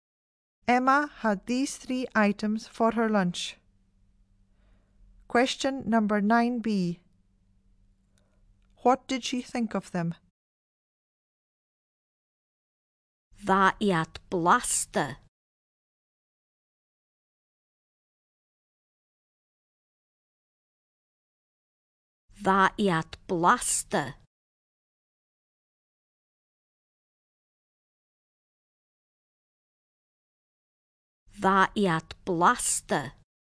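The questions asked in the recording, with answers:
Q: What did she think of them?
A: They were tasty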